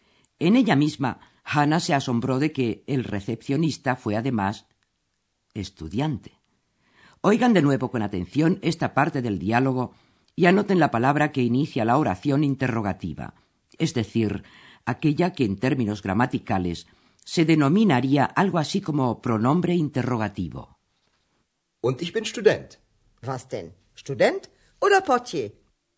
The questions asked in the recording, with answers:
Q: anoten la palabra que inicia la oración interrogativa es decir, aquella que en términos gramaticales se denominaría algo así como pronombre interrogativo.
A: Y es la palabra vas. ¿Qué?